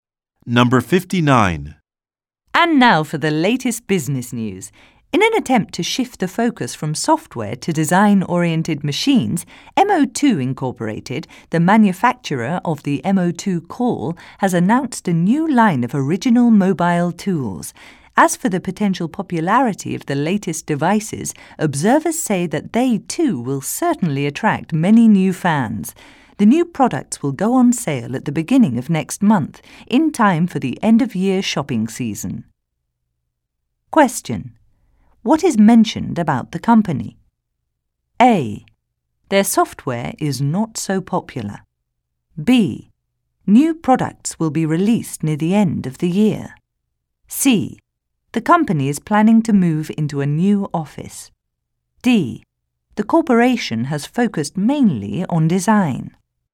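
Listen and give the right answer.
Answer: B: New products will be released near the end of the year.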